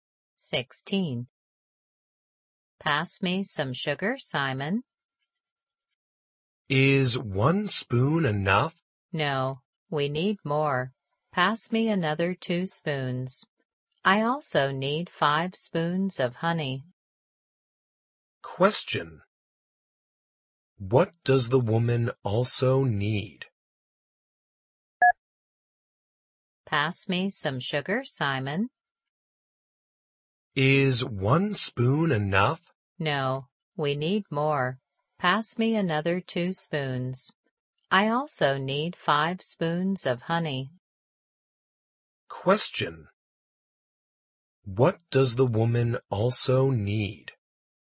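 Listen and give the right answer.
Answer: 5 spoons of honey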